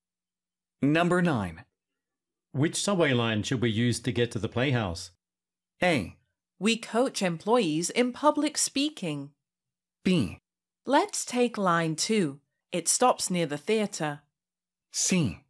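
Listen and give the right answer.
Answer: B: Let's take line 2. It stops near the theater.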